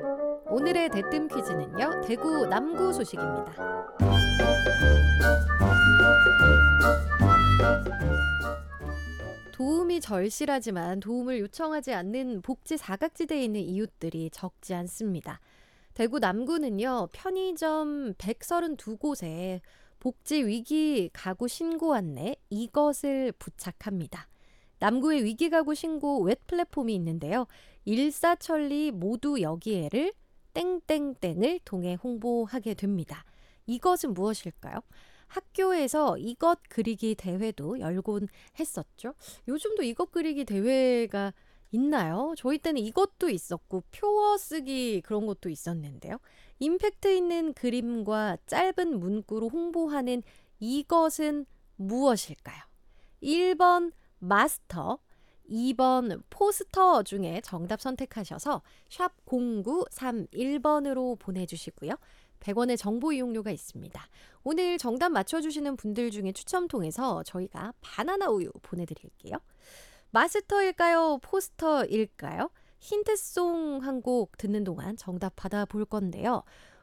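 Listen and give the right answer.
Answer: 2번: 포스터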